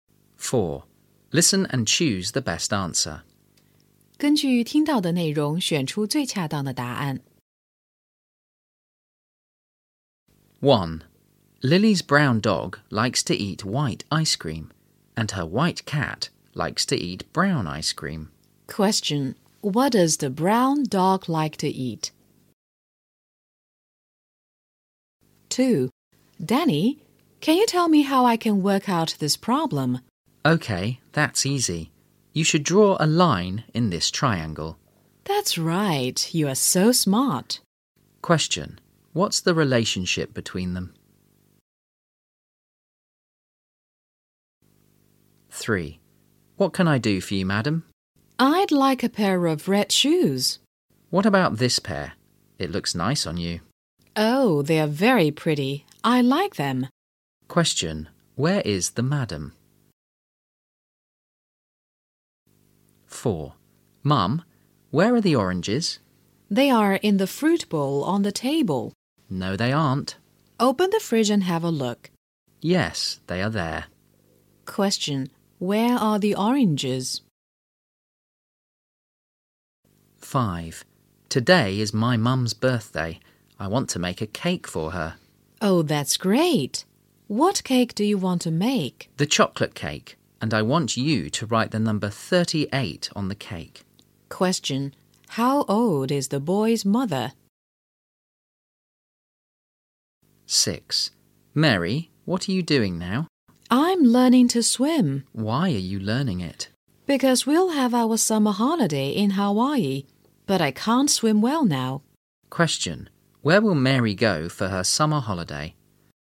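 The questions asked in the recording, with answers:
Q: Question what does the brown dog like to eat?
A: white ice cream

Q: Question Where is the madam?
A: in a shoe shop

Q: Question Where are the oranges?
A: in the fridge

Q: Question How old is the boy's mother?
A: 38

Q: Question Where will Mary go for her summer holiday?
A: Hawaii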